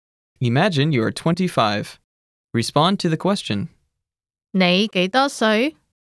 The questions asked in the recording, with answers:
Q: 你幾多歲?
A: 我25歲.